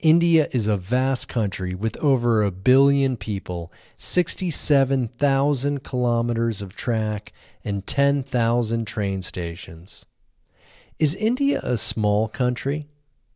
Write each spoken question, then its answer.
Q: Is India a small country?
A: No, India isn't a small country.